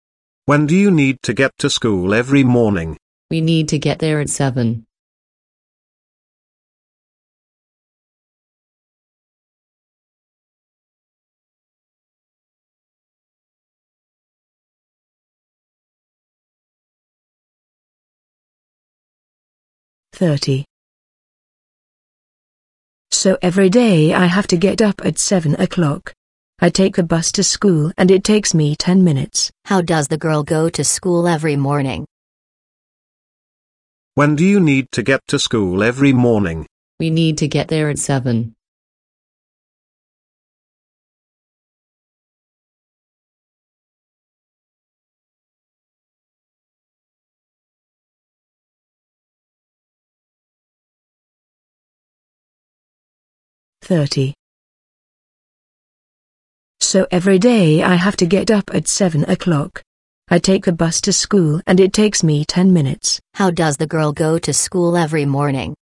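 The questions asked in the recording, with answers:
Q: How does the girl go to school every morning?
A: By bus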